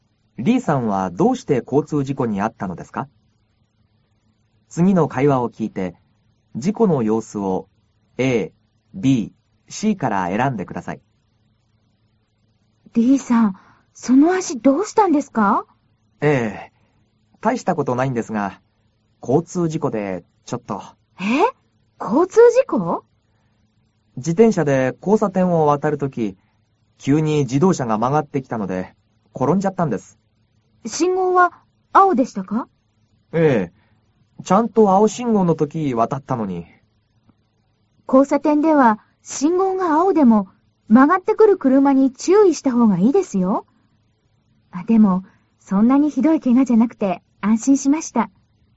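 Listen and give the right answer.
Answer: 自転車で青信号の交差点を渡っているとき、急に曲がってきた自動車をよけて転んだから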